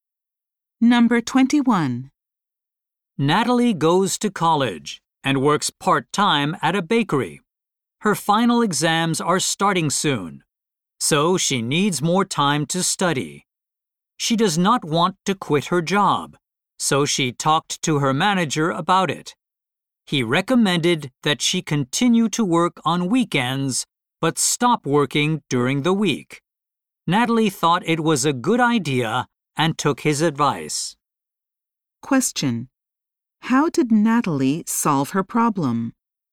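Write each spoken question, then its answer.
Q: how did Natalie solve her problem?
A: She kept working on weekends but stopped working during the week.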